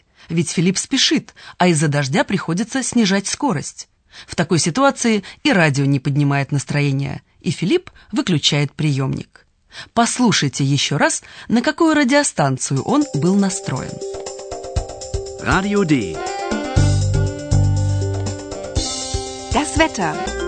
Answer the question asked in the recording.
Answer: Это была радиостанция «Радио Д»